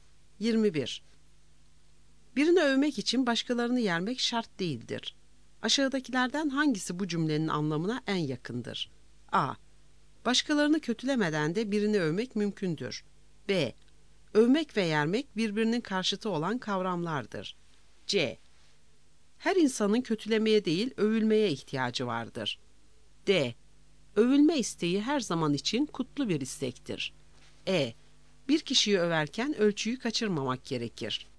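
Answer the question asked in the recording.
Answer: A: Başkalarını kötülemeden de birini övmek mümkündür.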